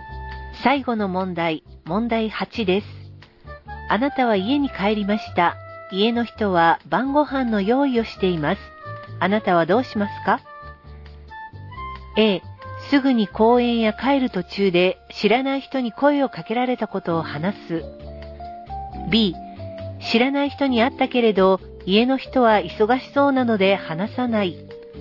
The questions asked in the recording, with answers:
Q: あなたはどうしますか?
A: 正解は A.